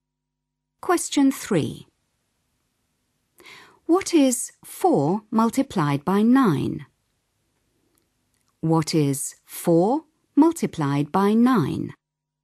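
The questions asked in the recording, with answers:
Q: What is 4 multiplied by 9?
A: 36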